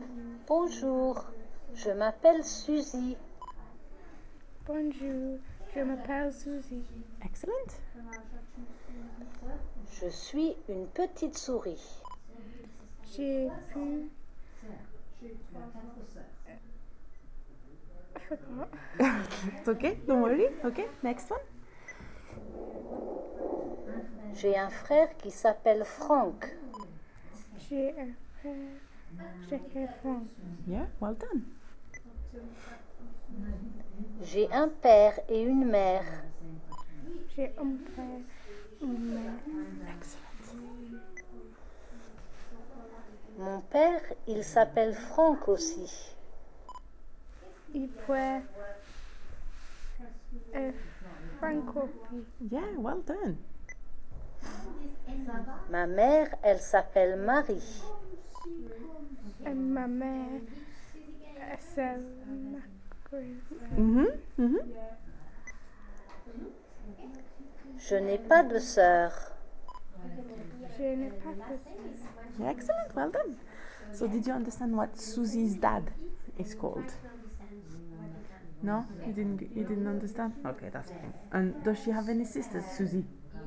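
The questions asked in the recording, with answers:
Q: So did you understand what Susie's dad is called?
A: Frank

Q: And does she have any sisters, Suzy?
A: No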